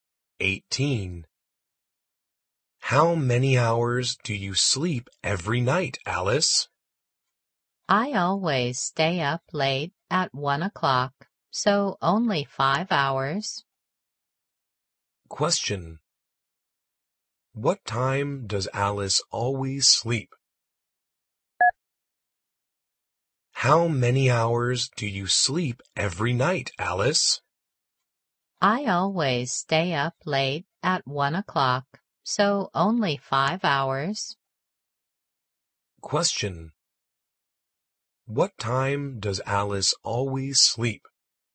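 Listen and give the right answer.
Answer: At 1 o'clock.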